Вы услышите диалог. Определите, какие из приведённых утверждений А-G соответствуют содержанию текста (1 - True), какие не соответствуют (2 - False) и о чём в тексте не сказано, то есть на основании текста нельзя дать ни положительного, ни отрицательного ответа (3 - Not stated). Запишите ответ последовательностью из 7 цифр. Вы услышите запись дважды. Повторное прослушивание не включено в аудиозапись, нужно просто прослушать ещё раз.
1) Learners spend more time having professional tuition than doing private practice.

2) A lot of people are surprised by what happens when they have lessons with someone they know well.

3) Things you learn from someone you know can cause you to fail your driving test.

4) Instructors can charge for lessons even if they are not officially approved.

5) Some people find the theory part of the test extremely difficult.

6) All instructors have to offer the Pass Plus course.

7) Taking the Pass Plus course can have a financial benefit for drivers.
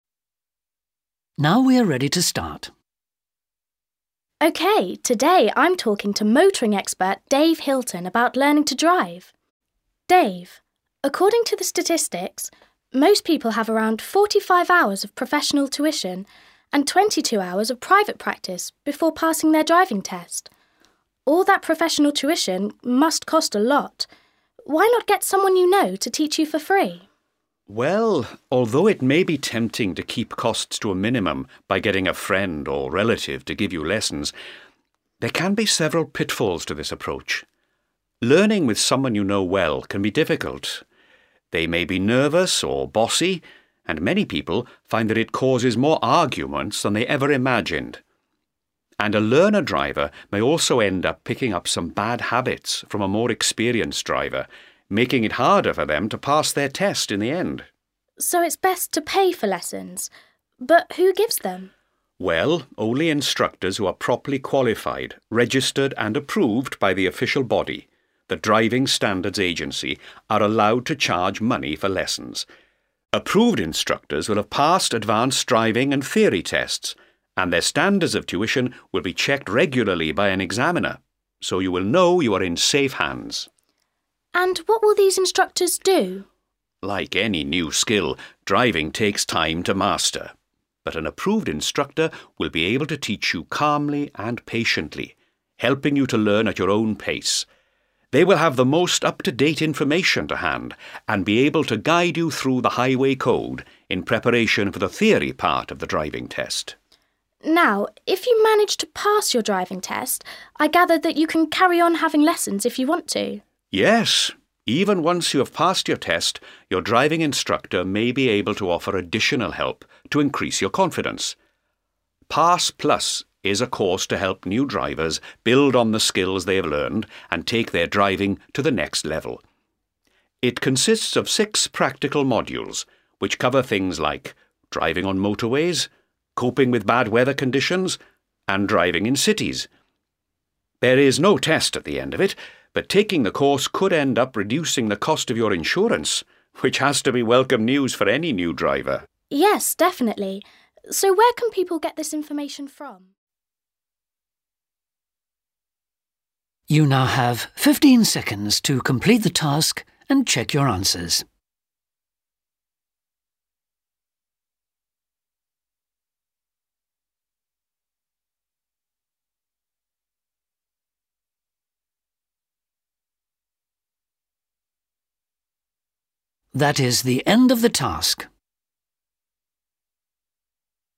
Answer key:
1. True
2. True
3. True
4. False
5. Not stated
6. False
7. True

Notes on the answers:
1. Ведущая говорит, что по данным статистики, большинство людей занимается с профессиональным инструктором приблизительно 45 часов и в частном порядке приблизительно 22 часа. Они проводят больше времени, посещая платные занятия, чем занимаясь самостоятельно.
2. Эксперт говорит, что, занимаясь с тем, кого они хорошо знают, "многие обнаруживают, что это вызывает больше споров, чем они могли себе представить" ('many реоре find that it causes more arguments than they еver imagined'). Они удивлены большим количеством возникающих у них споров.
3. По словам эксперта, люди, занимаясь с хорошо знакомым им человеком, "могут, в конце концов, перенять у него некоторые дурные привычки" ('end up picking up some bad habbits'), и из-за них им, возможно, будет труднее сдать экзамен на получение водительских прав. В результате, они могут не сдать экзамен из-за вредных привычек, перенятых у знакомых.
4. Эксперт рассказывает, что "право брать плату за занятия" ('аге allowed to charge money for lessons') 'имеют только инструкторы, "имеющие достаточную квалификацию, зарегистрированные и утвержденные официальным органом" ('рroperly qualified, registered and аррroved by the official body (организацией)'). Это означает, что люди, не утвержденные официальной организацией — the Driving Standards Agency — нe могут брать плату за занятия.
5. Эксперт говорит, что зарегистрированные инструкторы могут "пройти с вами правила дорожного движения для подготовки к теоретической части экзамена" ('guide you through the Highway Code in preparation for the theory part of the driving test'). Они могут научить вас правилам и информации нужным для сдачи теоретической части экзамена. Так или иначе, он не говорит, находят люди эту часть экзамена сложной или нет.
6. Эксперт говорит, что инструктор "сможет предложить вам дополнительную помощь" ('may be able to offer additional help') после того, как вы сдали экзамен, Такую дополнительную помощь предоставляет курс Pass Plus. Так или иначе, тот факт, что он говорит, что инструктор «может» ('may') предложит это, означает, что некоторые инструкторы не предлагают этот курс и не обязаны его предлагать.